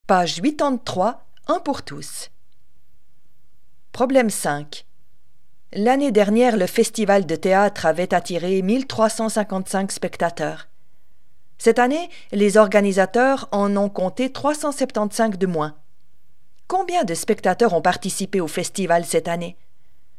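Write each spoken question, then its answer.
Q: Combien de spectateurs ont participé au festival cette année?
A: 980 spectateurs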